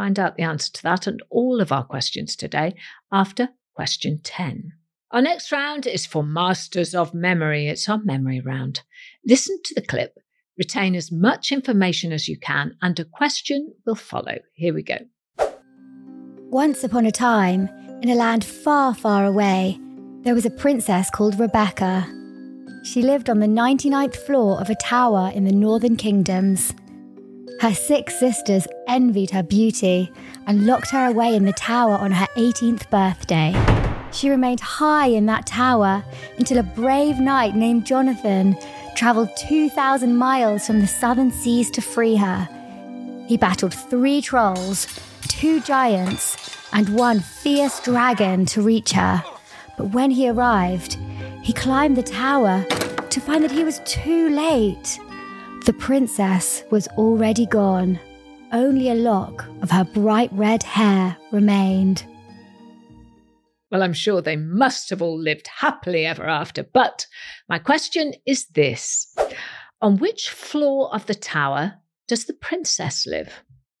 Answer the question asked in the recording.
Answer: And the answer was the 99th floor.